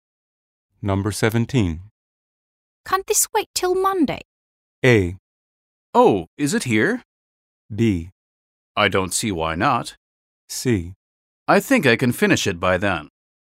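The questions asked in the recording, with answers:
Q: Can't this wait till Monday?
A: B: I don't see why not.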